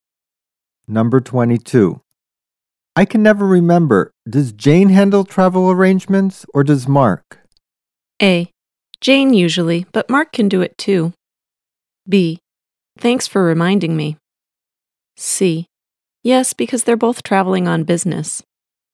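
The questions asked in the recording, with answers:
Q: I can never remember. Does Jane handle travel arrangements or does Mark?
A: A: Jane usually, but Mark can do it too.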